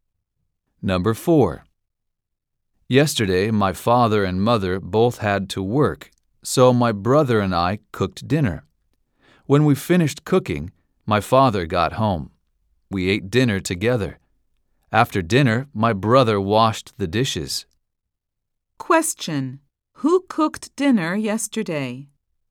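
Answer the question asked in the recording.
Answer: The boy and his brother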